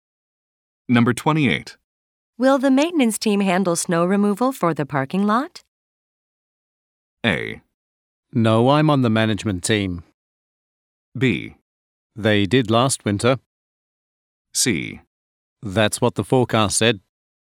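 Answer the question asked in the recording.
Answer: B: They did last winter.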